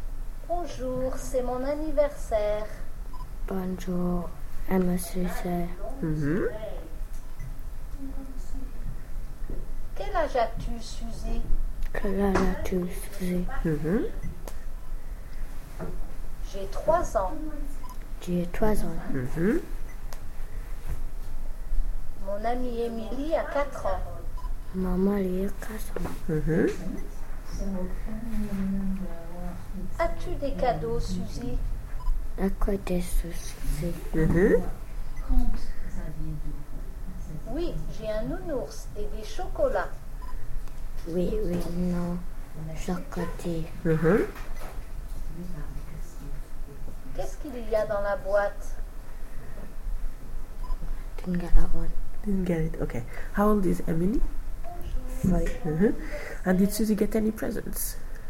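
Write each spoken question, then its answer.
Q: And did Suzy get any presents?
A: Yes, a teddy bear and chocolates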